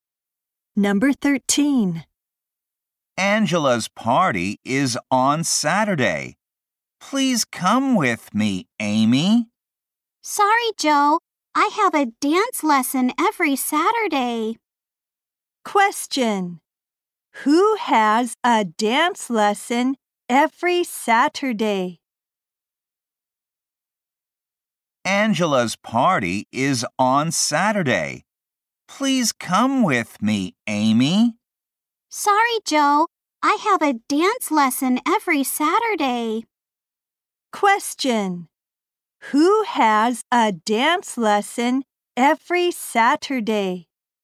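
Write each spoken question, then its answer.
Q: Who has a dance lesson every Saturday?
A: Amy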